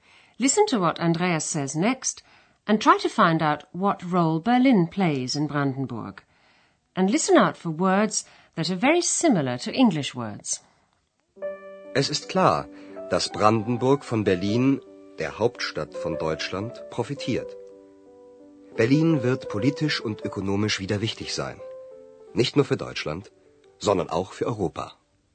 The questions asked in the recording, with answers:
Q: Listen to what Andreas says next and try to find out what role Berlin plays in Brandenburg.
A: Brandenburg will profit, profitieren, from the fact that Berlin is the capital of Germany.